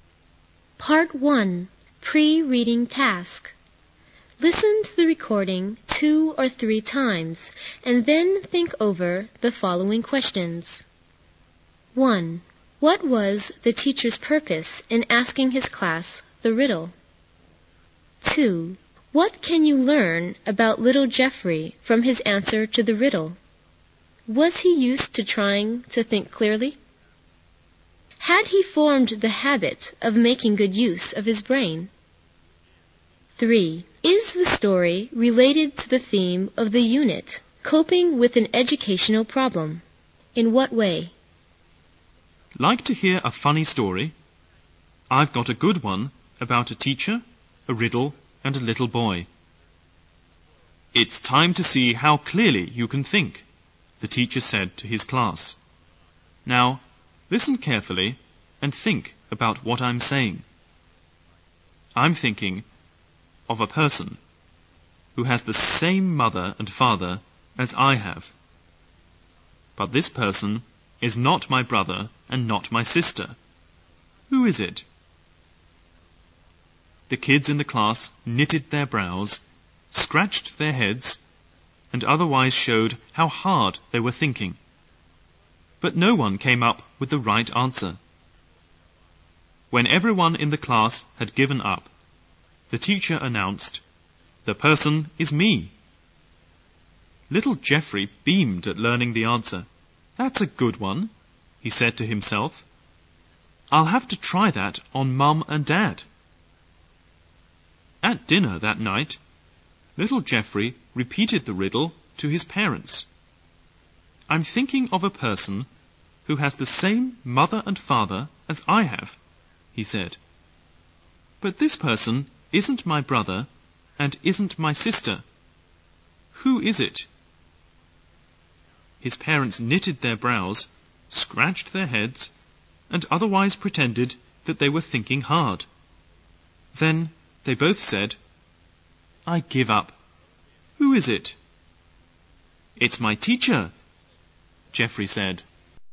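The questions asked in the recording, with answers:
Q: What was the teacher's purpose in asking his class the riddle?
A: To see how clearly the students could think

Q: Was he used to trying to think clearly?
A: No, he just repeated the riddle without understanding it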